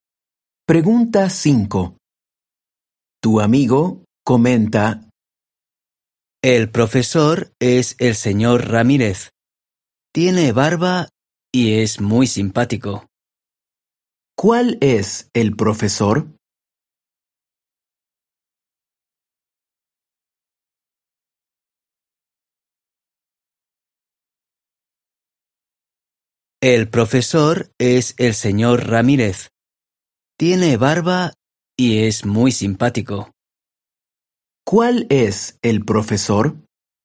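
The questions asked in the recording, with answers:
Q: ¿Cuál es el profesor?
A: El señor Ramírez, el que tiene barba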